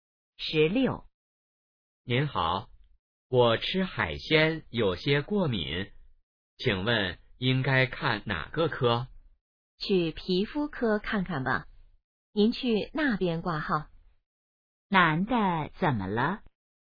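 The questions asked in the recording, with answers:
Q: 男的怎么了?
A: 吃海鲜过敏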